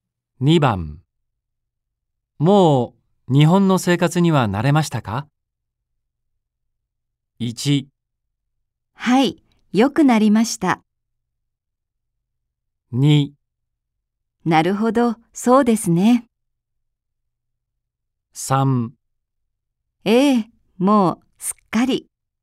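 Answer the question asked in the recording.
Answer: 3: ええ、もうすっかり。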